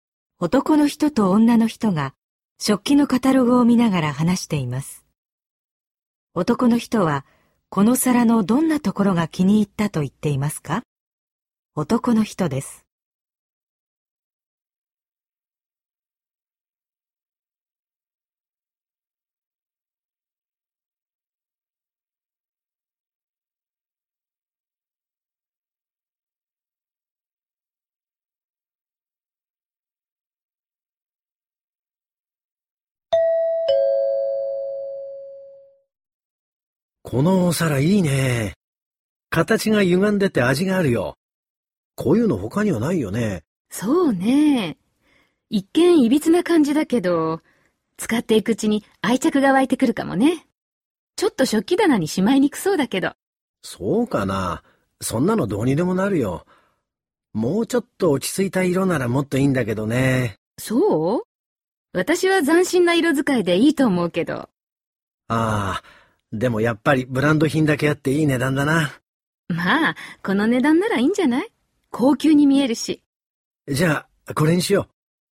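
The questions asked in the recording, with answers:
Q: 男の人は、この皿のどんなところが気に入ったと言っていますか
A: 形が歪んでいて他にないところ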